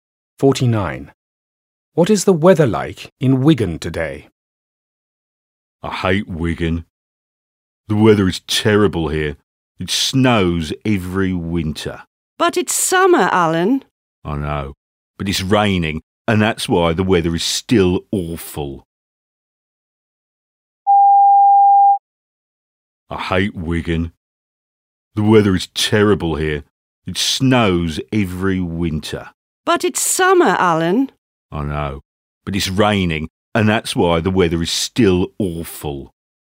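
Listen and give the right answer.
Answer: rainy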